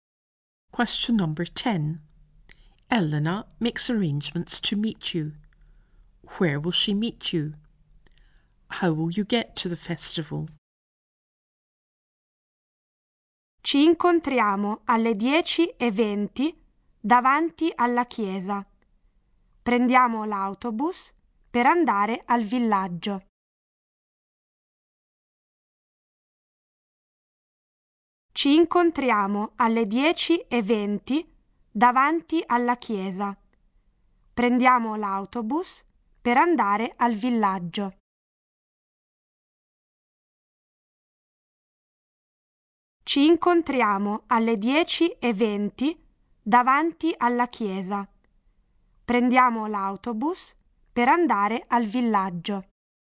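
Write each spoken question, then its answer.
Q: Where will she meet you?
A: In front of the church (at 10:20)

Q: How will you get to the festival?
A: By bus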